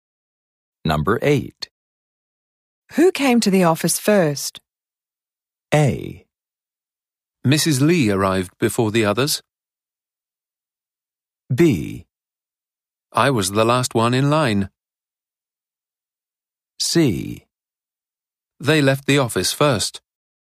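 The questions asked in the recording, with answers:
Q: Who came to the office first?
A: A: Mrs. Lee arrived before the others.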